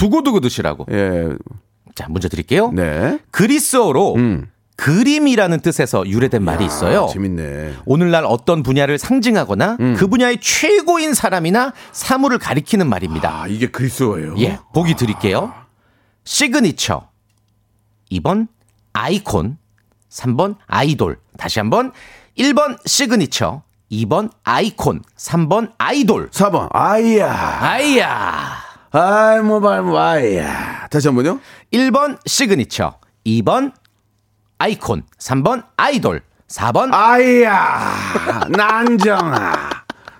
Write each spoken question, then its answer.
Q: 오늘날 어떤 분야를 상징하거나 음. 그 분야의 최고인 사람이나 사물을 가리키는 말입니다.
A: 오늘 그 정답은 아이콘이었죠, 아이콘.